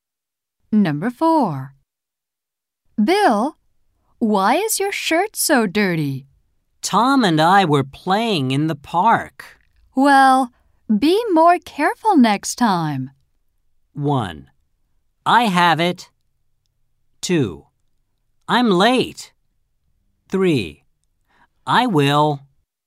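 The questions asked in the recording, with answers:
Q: Well, be more careful next time.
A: 3: I will.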